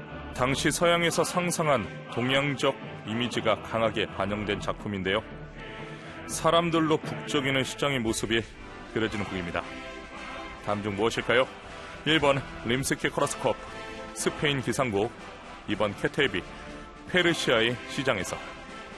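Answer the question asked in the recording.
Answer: 2번: 케텔비, 페르시아의 시장에서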